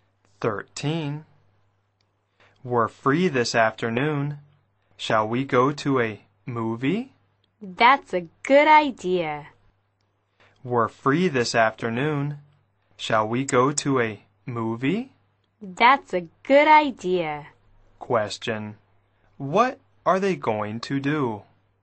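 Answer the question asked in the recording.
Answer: Go to a movie.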